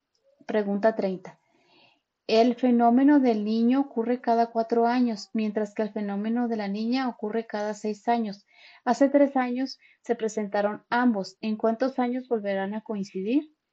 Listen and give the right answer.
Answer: Y la respuesta correcta es la B, 9.